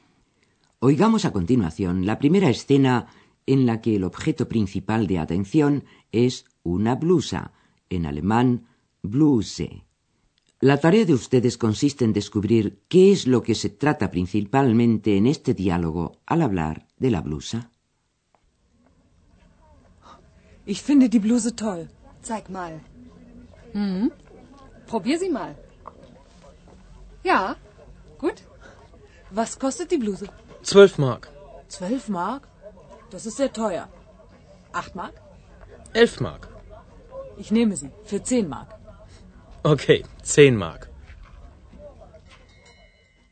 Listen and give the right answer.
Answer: Lo principal, como lo habrán advertido con toda seguridad, era el regateo sobre el precio de la blusa.